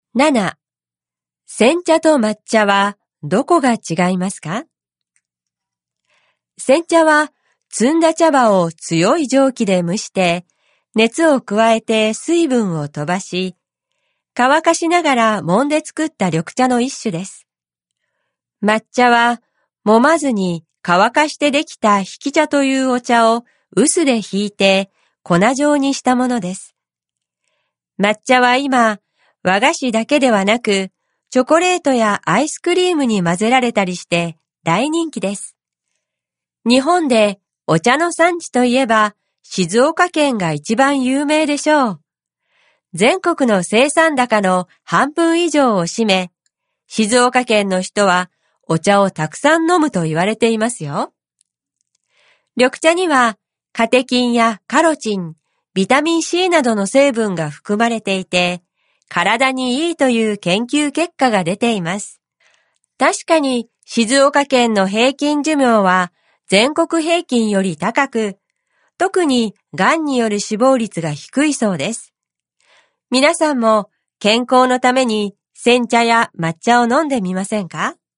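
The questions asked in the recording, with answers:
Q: 煎茶と抹茶はどこが違いますか?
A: 煎茶は蒸した茶葉を乾かしながら揉んで作るが、抹茶は揉まずに乾かした茶を臼で引いて粉状にしたもの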